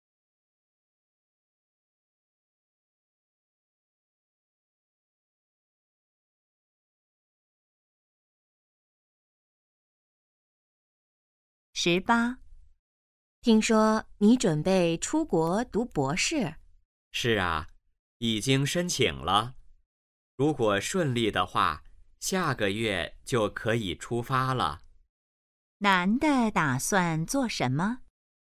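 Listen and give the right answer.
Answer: 出国读博士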